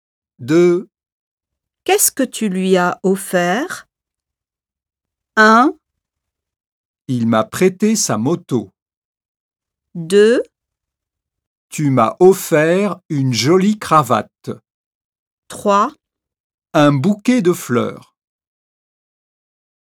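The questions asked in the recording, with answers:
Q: Qu'est-ce que tu lui as offert?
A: 3: Un bouquet de fleurs.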